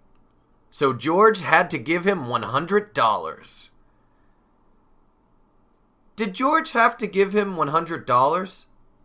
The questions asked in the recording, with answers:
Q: Did George have to give him $100?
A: He certainly did. George had to give him $100.